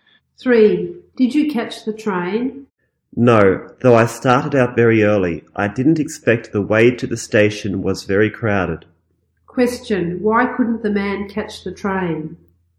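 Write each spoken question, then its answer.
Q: Why couldn't the man catch the train?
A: The way to the station was very crowded.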